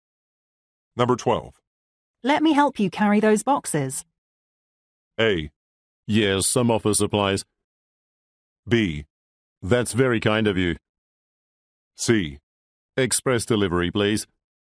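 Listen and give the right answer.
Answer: B: That's very kind of you.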